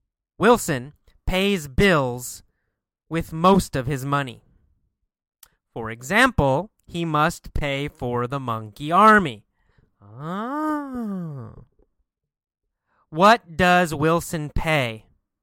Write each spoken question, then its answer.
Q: What does Wilson pay?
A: Bills. Wilson pays bills every month.